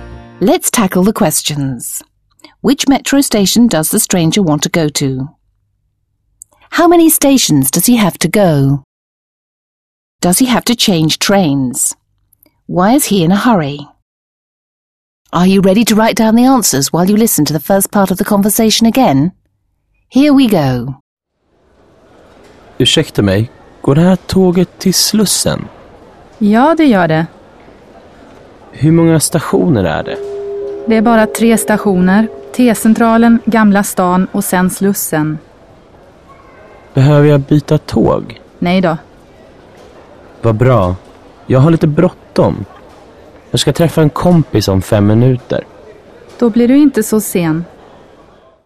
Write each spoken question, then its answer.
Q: Which metro station does the stranger want to go to?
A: He wants to go to Slussen.

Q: How many stations does he have to go?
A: There are only 3 stations.

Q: Does he have to change trains?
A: No, he doesn't have to change trains.

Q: Why is he in a hurry?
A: He's in a hurry because he's going to meet a friend in 5 minutes.